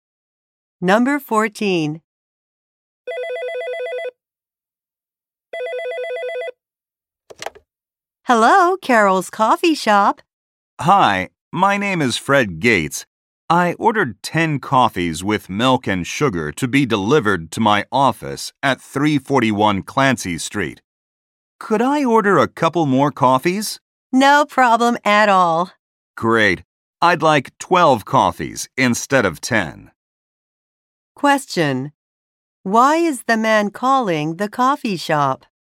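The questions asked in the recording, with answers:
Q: Why is the man calling the coffee shop?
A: To change his order to 12 coffees.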